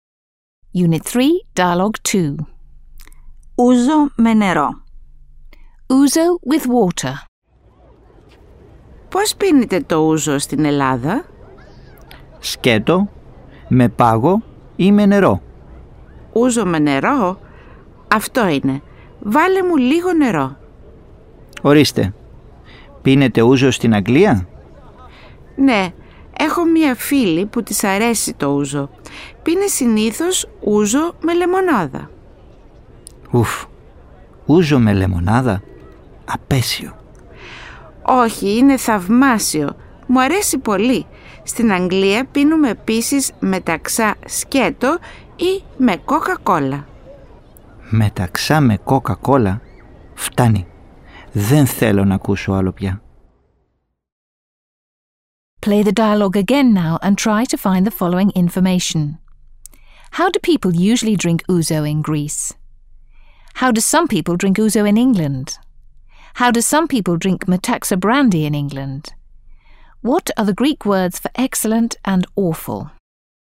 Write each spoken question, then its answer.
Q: How do people usually drink ouzo in Greece?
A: People in Greece usually drink ouzo straight, on the rocks, or with water.

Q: How do some people drink ouzo in England?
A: Some people in England drink ouzo with lemonade

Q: How do some people drink Metaxa brandy in England?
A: and Metaxa brandy with Coke.

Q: What are the Greek words for excellent and awful?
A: Θαυμάσιο and απέσιο are the two Greek words for excellent and awful.